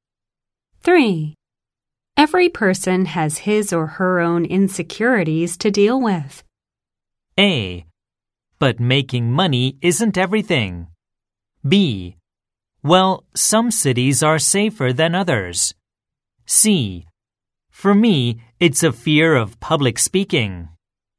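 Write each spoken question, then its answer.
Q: Every person has his or her own insecurities to deal with.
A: C: For me, it's a fear of public speaking.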